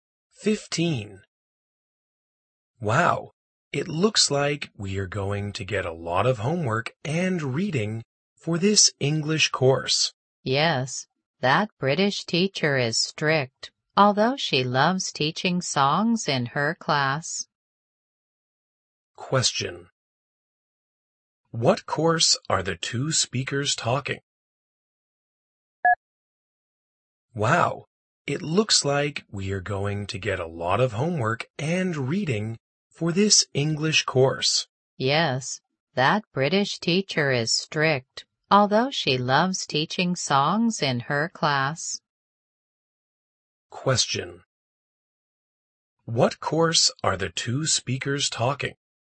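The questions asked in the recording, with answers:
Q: What course are the two speakers talking?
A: English course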